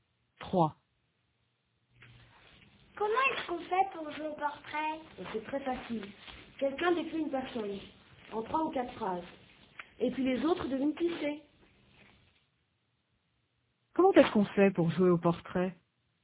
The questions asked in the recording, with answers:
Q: Comment est-ce qu'on fait pour jouer au portrait?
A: Quelqu'un décrit une personne et les autres devinent qui c'est.